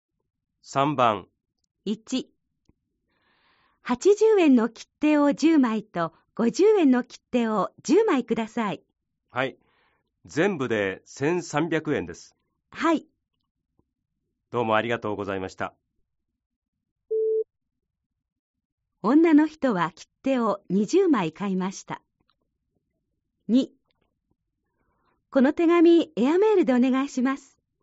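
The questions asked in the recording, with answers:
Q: 女の人は切手を20枚買いました。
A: ○(正しい)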